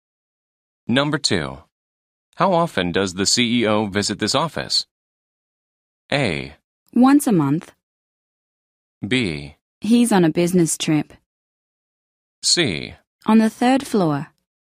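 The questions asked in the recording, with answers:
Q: How often does the CEO visit this office?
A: A: Once a month.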